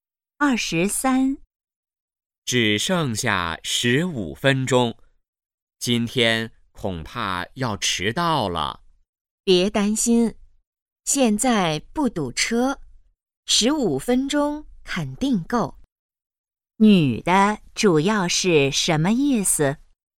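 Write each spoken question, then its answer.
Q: 女的主要是什么意思?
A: 不会迟到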